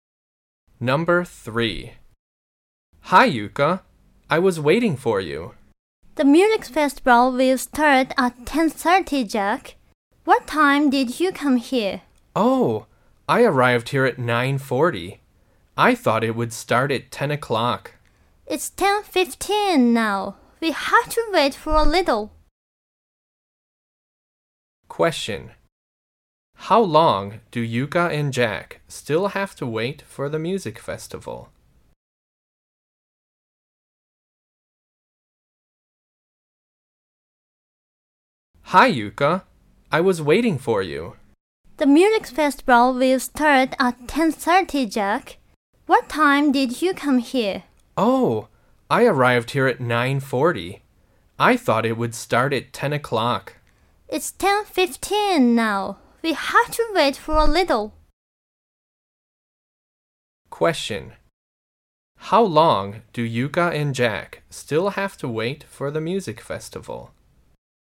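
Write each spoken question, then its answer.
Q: How long do Yuka and Jack still have to wait for the music festival?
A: 15 minutes.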